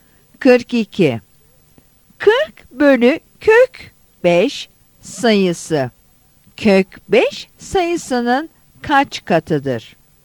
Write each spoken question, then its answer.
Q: Kök 5 sayısının kaç katıdır?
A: Yanıt C'dir.